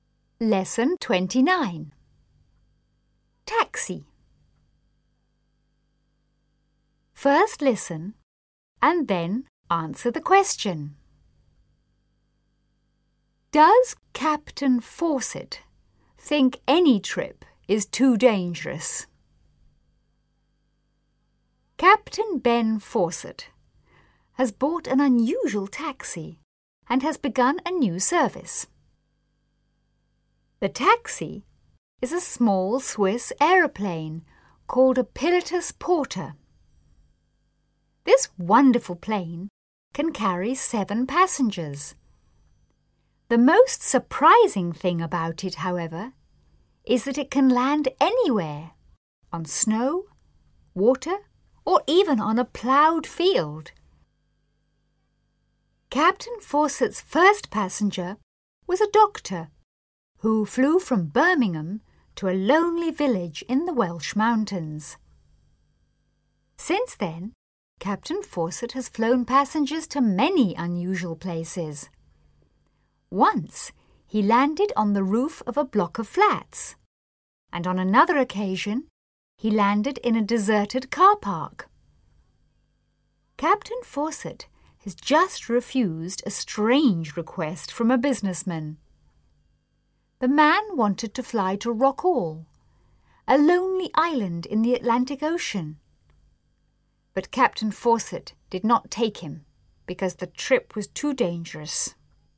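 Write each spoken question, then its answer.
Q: Does Captain Fawcett think any trip is too dangerous?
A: Yes, he refused to fly a businessman to Rockall because the trip was too dangerous.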